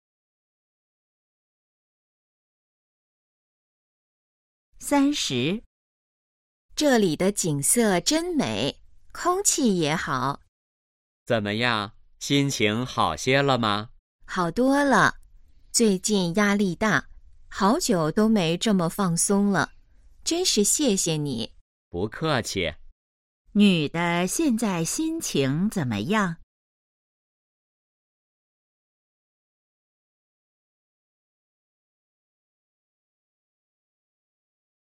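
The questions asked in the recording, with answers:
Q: 女的现在心情怎么样?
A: 好多了,很放松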